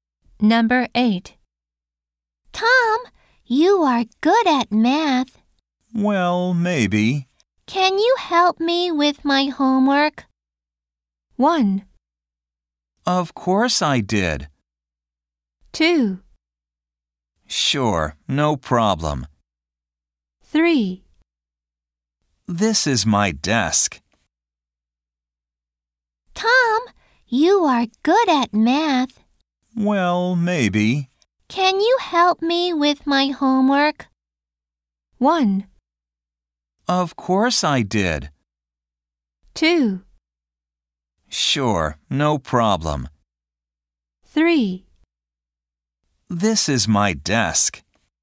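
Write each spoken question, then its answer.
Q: Can you help me with my homework?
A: 2: Sure, no problem.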